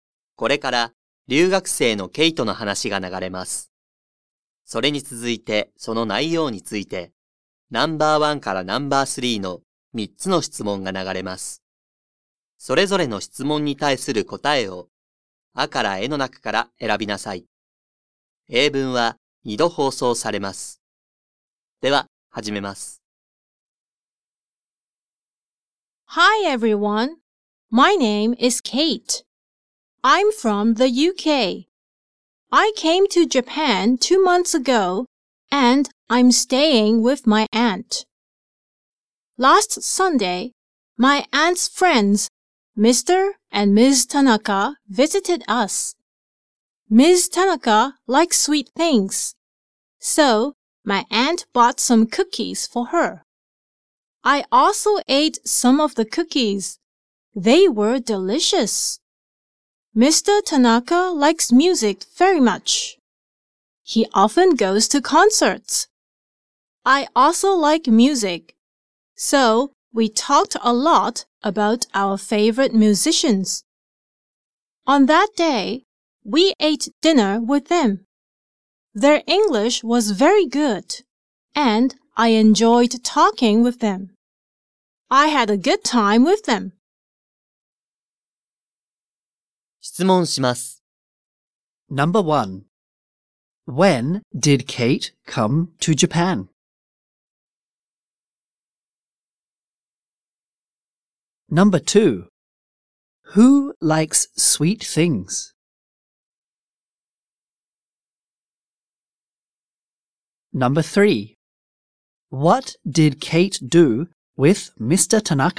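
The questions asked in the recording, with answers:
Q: When did Kate come to Japan?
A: Two months ago.

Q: Who likes sweet things?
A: Ms. Tanaka.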